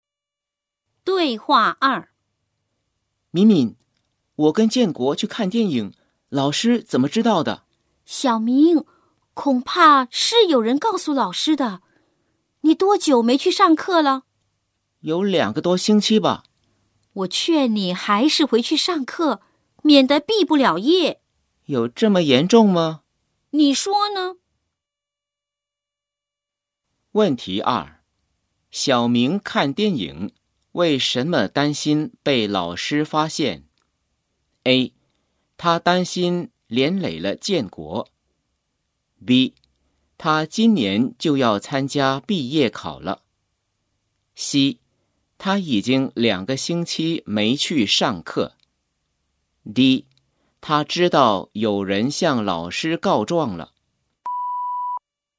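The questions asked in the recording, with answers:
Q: 小明看电影,为什么担心被老师发现?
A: C: 他已经两个星期没去上课。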